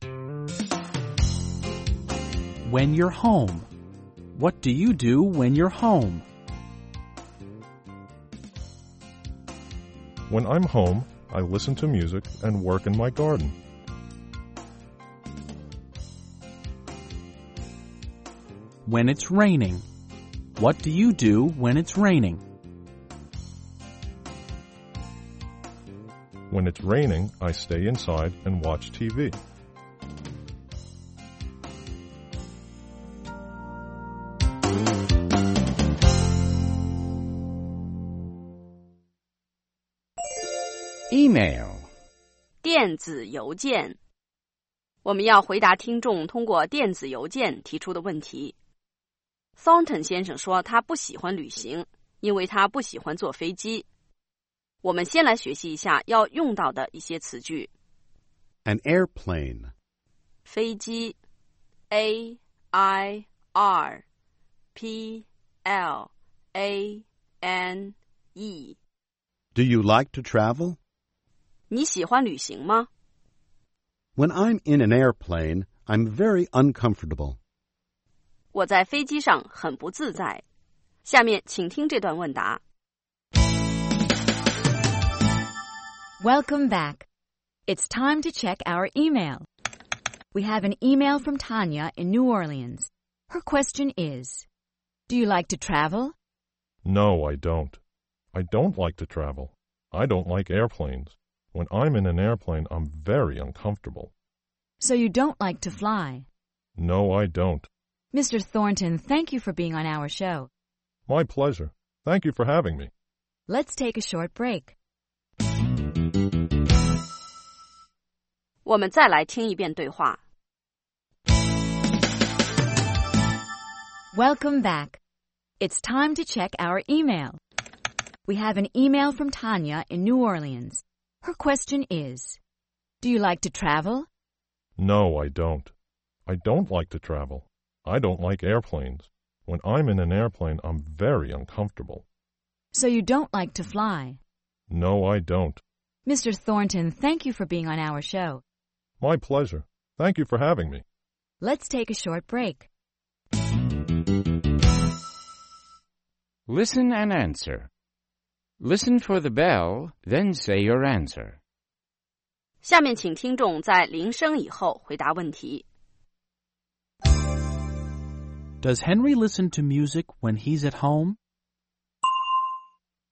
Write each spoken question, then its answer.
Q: Does Henry listen to music when he's at home?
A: Yes, he does. He listens to music.